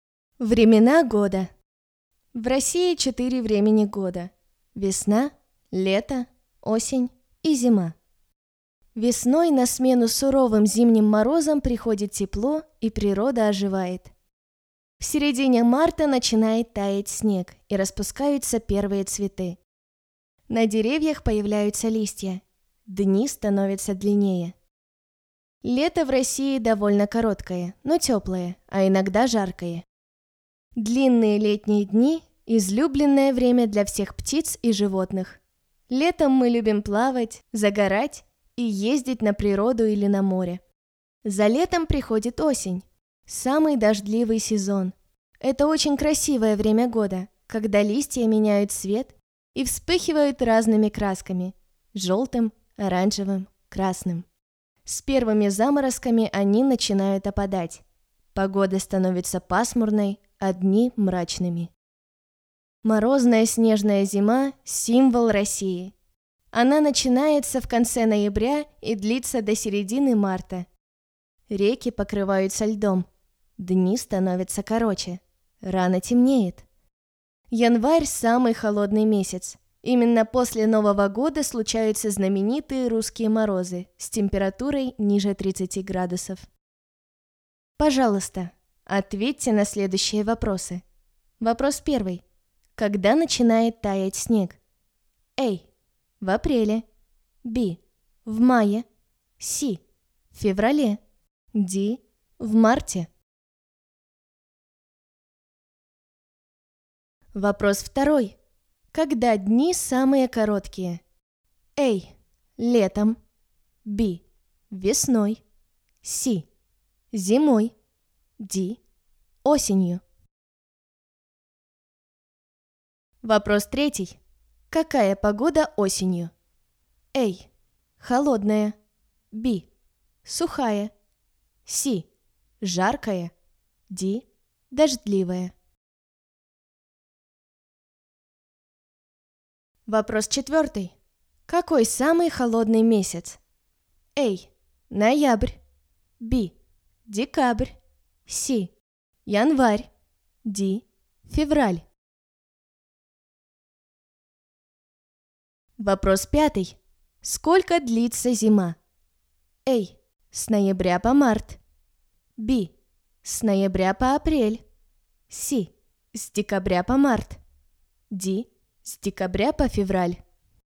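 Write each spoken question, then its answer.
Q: Когда начинает таять снег?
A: D: В марте.

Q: Когда дни самые короткие?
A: C: Зимой.

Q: Какая погода осенью?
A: D: Дождливая.

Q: Какой самый холодный месяц?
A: C: Январь.

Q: Сколько длится зима?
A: A: С ноября по март.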